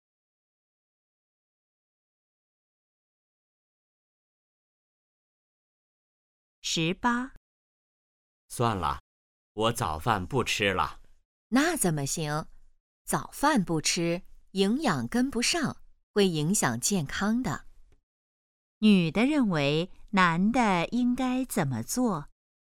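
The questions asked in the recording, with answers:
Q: 女的认为男的应该怎么做?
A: 吃早饭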